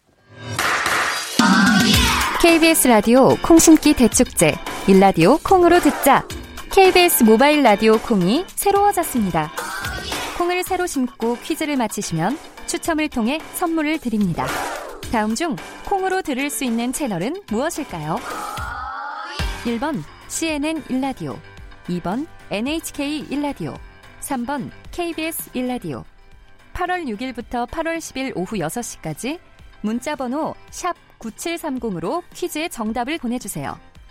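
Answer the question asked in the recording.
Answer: 3: KBS 일라디오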